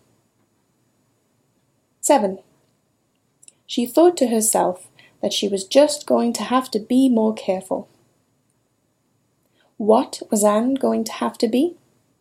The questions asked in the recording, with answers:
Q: What was Anne going to have to be?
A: She was going to have to be more careful.